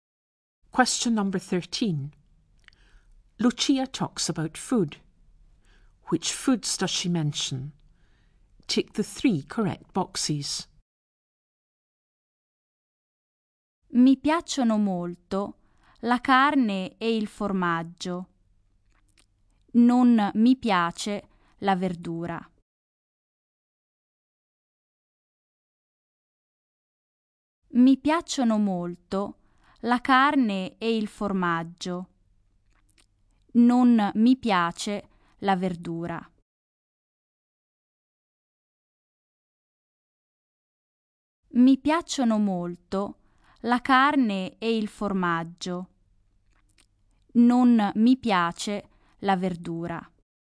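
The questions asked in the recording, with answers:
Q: Which foods does she mention?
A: Meat, cheese and vegetables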